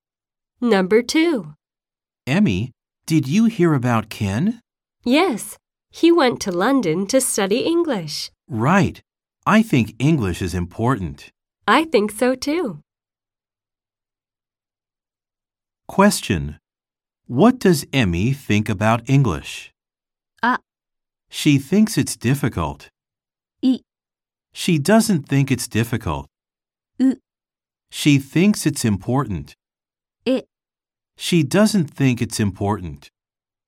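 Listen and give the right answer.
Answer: う: She thinks it's important.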